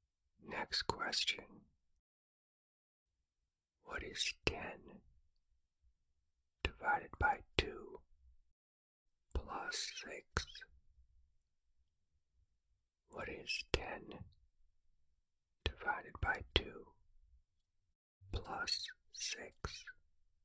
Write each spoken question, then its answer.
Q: What is 10 divided by 2 plus 6?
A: The answer is 11.